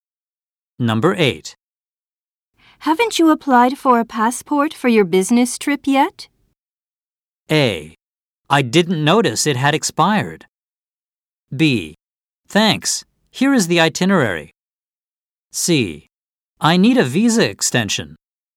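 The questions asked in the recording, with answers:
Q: Haven't you applied for a passport for your business trip yet?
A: A: I didn't notice it had expired.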